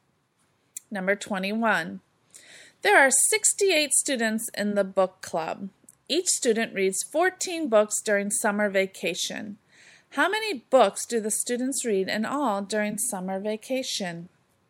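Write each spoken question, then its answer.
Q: How many books do the students read in all during summer vacation?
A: 952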